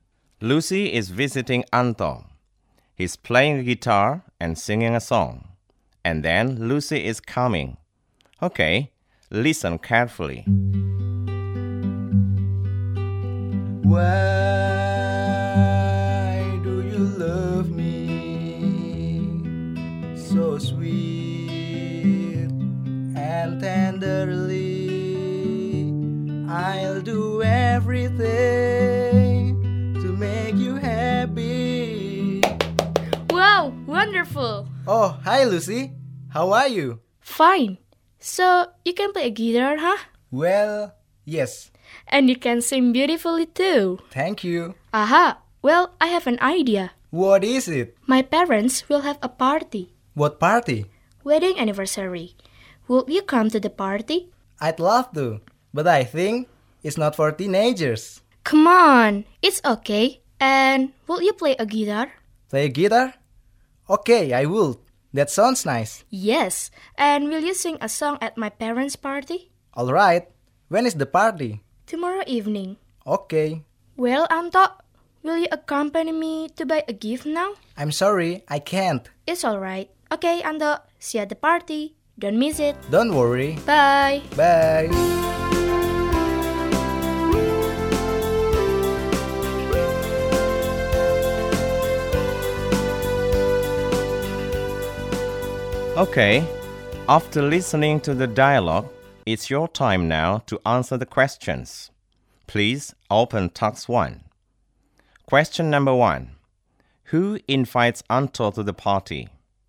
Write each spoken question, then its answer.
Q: Who invites Anto to the party?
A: Lucy, right.